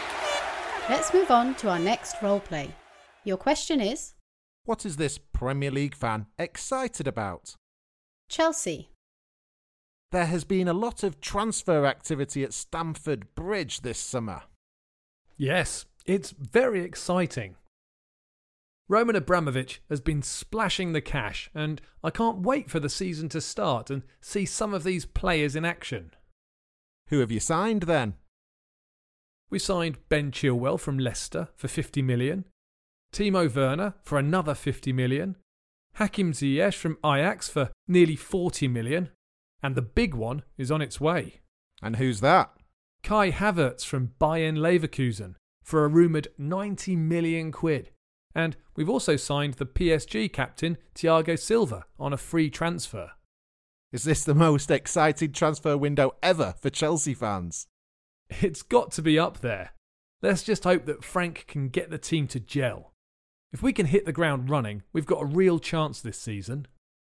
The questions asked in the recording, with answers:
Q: What is this Premier League fan excited about?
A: Well, he's excited about all the new signings that Chelsea have made.